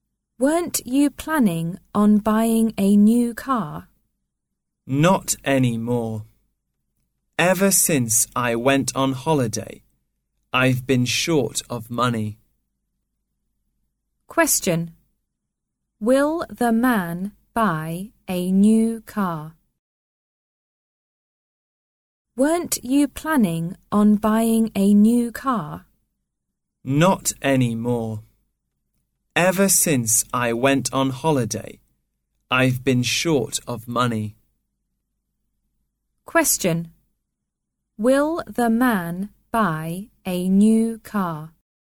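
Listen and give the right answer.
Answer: No, he is short of money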